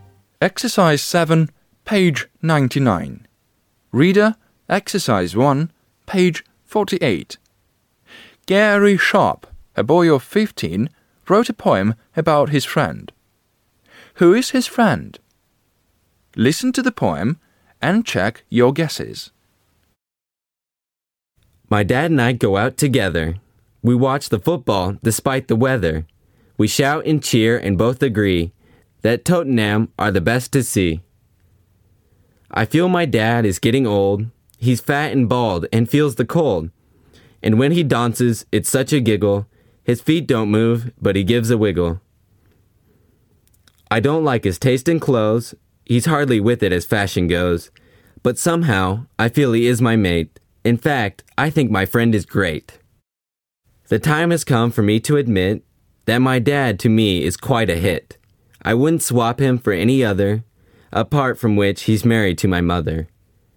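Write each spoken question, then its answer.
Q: Who is his friend?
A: His dad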